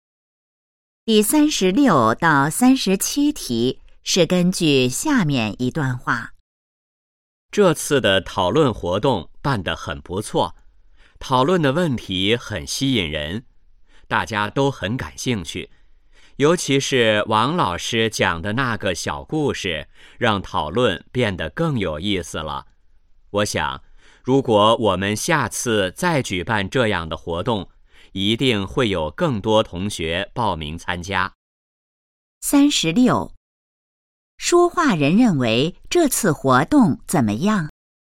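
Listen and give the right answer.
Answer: 办得很不错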